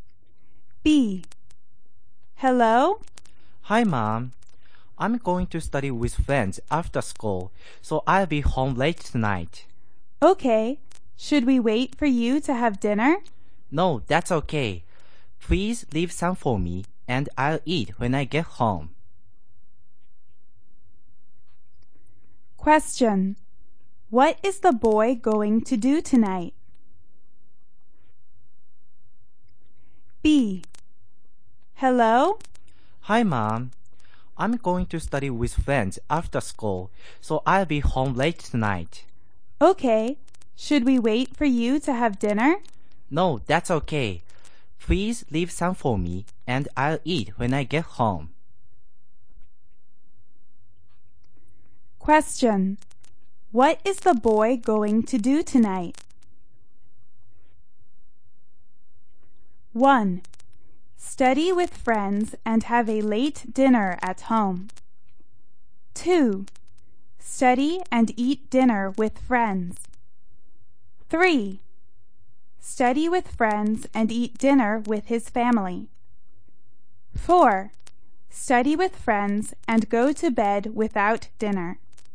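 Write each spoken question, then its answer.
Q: What is the boy going to do tonight?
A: 1: Study with friends and have a late dinner at home.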